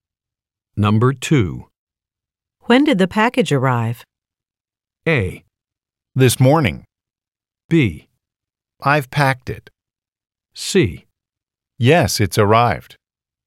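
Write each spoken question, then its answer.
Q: When did the package arrive?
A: A: This morning.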